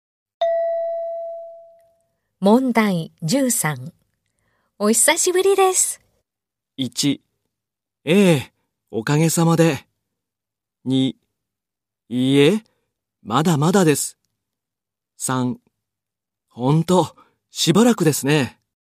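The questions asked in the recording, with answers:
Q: お久しぶりです。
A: 2: ほんと、しばらくですね。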